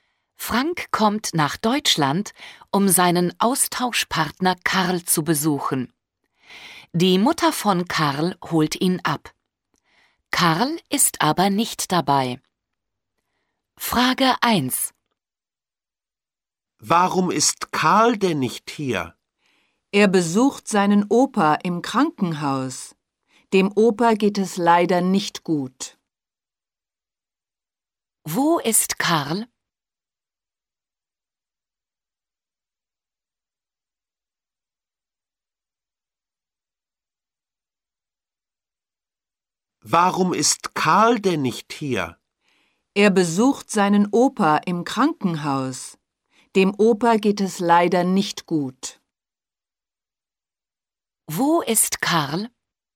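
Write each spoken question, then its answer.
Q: Wo ist Karl?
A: Im Krankenhaus (er besucht seinen Opa)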